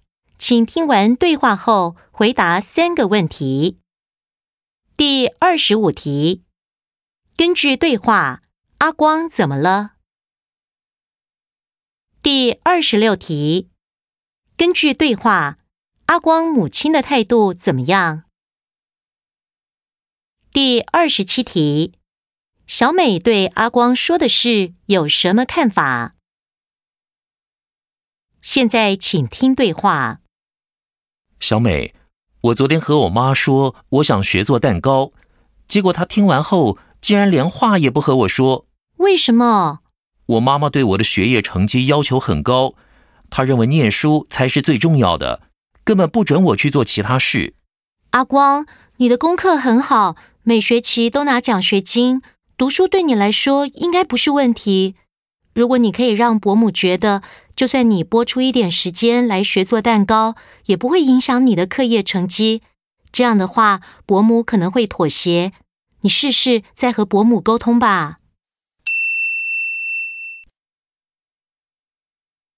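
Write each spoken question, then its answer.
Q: 根据对话,阿光怎么了?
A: 他想学做蛋糕,母亲听后不和他说话

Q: 根据对话,阿光母亲的态度怎么样?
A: 反对,认为念书最重要,不准他做其他事

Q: 小美对阿光说的事有什么看法?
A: 她认为只要让母亲相信学做蛋糕不影响成绩,母亲可能会妥协,建议他再沟通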